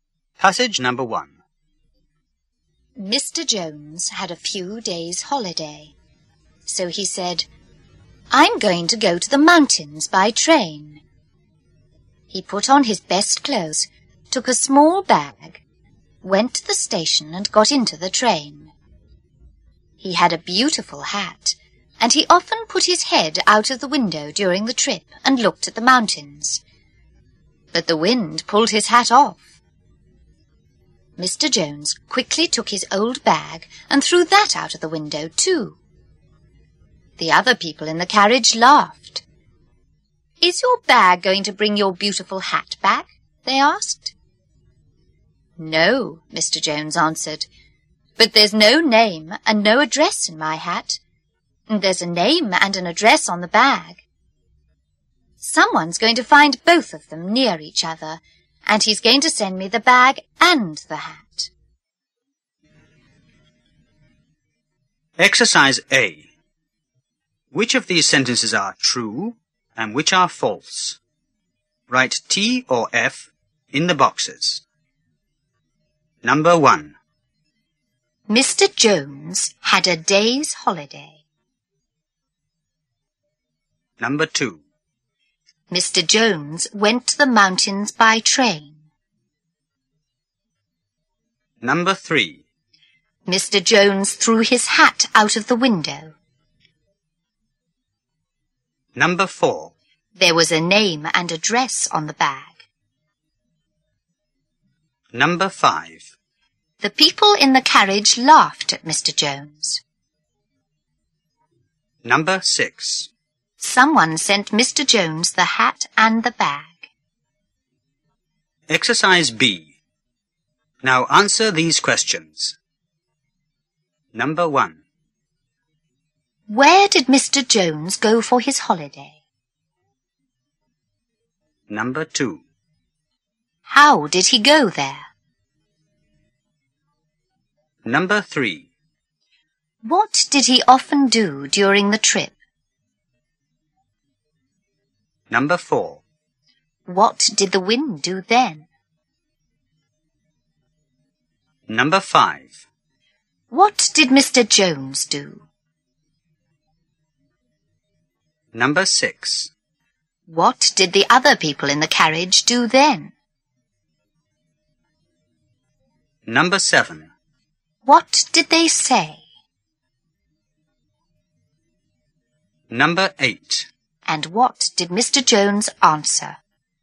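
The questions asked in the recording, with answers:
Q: Mr. Jones had a day's holiday.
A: False (he had a few days' holiday)

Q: Mr. Jones went to the mountains by train.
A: True

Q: Mr. Jones threw his hat out of the window.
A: False (the wind pulled it off; he threw his bag)

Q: There was a name and address on the bag.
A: True

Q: The people in the carriage laughed at Mr. Jones.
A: True

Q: Where did Mr. Jones go for his holiday?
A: To the mountains

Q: How did he go there?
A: By train

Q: What did he often do during the trip?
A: He put his head out of the window and looked at the mountains

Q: What did the wind do then?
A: It pulled his hat off

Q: What did Mr. Jones do?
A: He threw his old bag out of the window too

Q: What did the other people in the carriage do then?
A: They laughed

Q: What did they say?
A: "Is your bag going to bring your beautiful hat back?"

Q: And what did Mr. 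Jones answer?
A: No, but there's a name and address on the bag, not in the hat; someone will find both and send them to him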